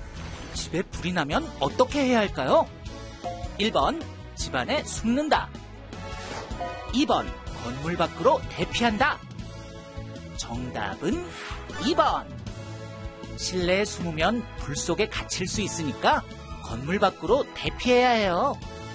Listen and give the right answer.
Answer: 정답은 2번.